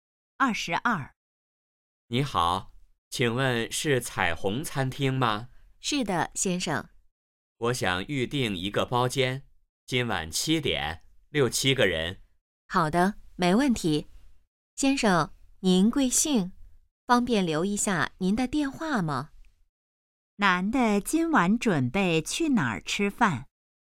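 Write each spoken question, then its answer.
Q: 男的今晚准备去哪儿吃饭?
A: 彩虹餐厅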